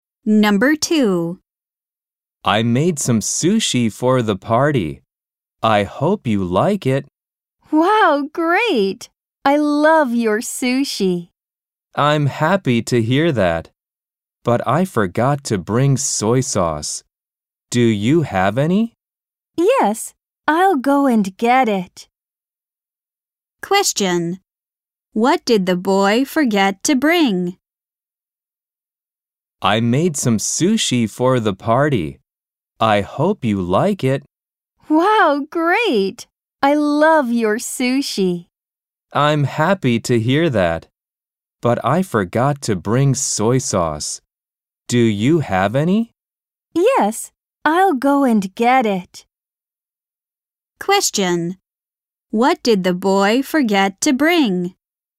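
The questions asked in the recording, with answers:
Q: What did the boy forget to bring?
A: Soy sauce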